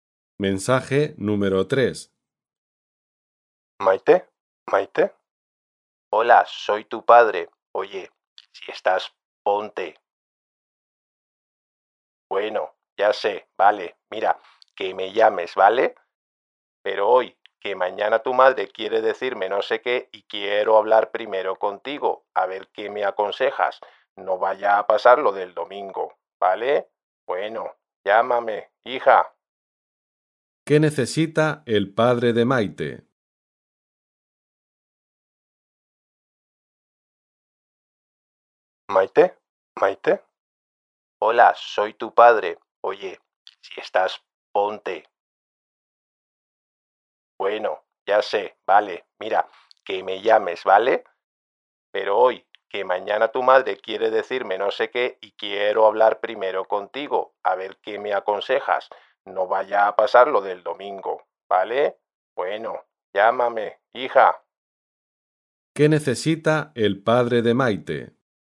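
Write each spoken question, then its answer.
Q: ¿Qué necesita el padre de Maite?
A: Que Maite lo llame hoy para pedirle consejo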